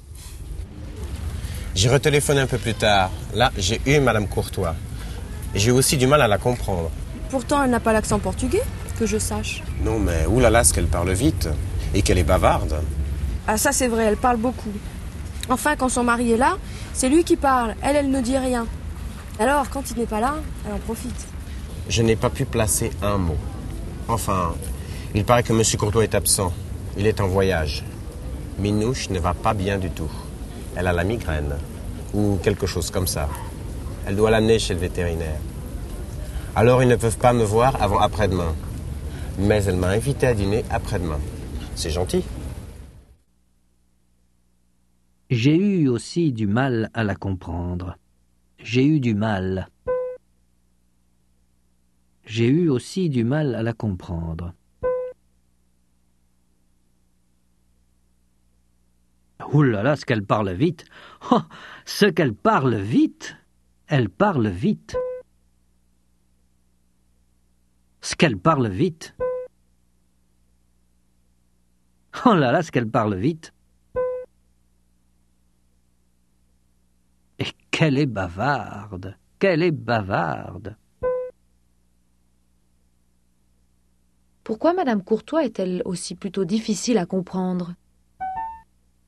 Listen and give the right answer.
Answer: Parce qu'elle parle vite et qu'elle est bavarde.